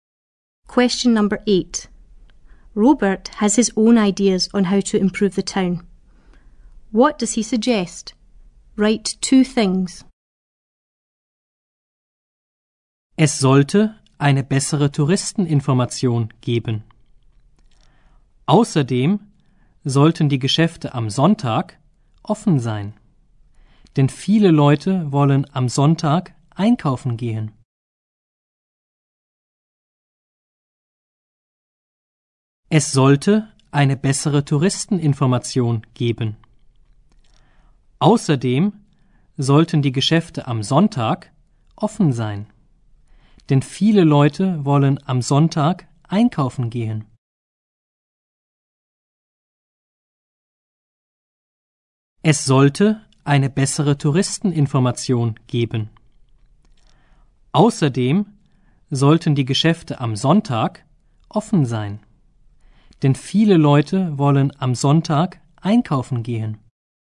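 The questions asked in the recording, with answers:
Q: What does he suggest? Write two things.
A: A better tourist information office; shops should be open on Sundays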